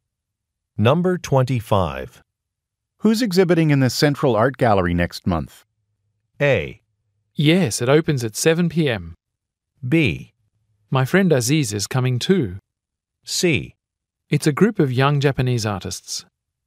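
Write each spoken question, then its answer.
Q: Who's exhibiting in the Central Art Gallery next month?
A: C: It's a group of young Japanese artists.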